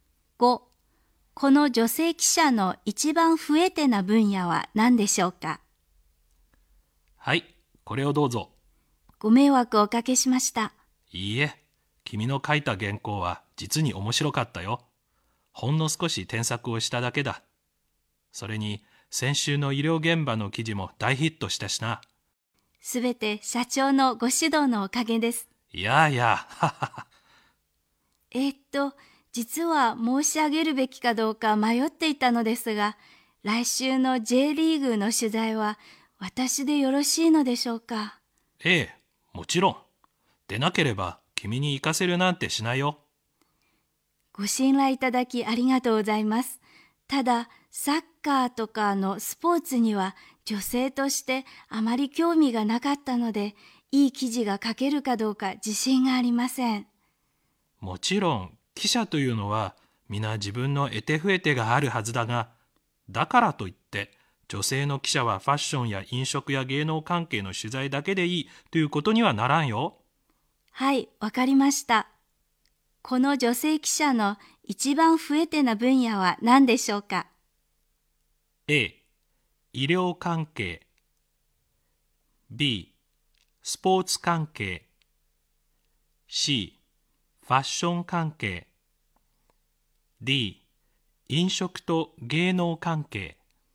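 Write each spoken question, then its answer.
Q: この女性記者の一番増えてな分野は何でしょうか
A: B: スポーツ関係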